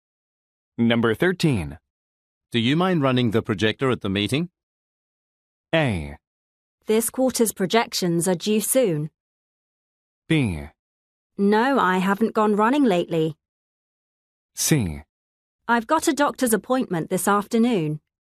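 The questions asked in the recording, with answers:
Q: Do you mind running the projector at the meeting?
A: C: I've got a doctor's appointment this afternoon.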